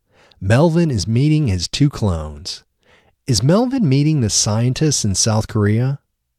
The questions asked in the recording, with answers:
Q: Is Melvin meeting the scientists in South Korea?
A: No, Melvin isn't meeting the scientists in South Korea.